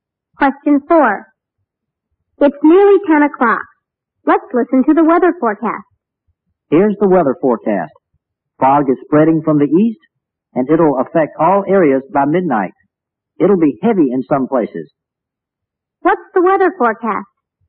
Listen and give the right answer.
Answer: There'll be fog in all areas by midnight.